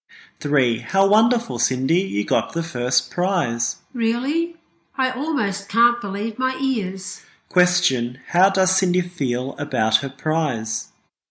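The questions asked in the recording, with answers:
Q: How does Cindy feel about her prize?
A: Surprised.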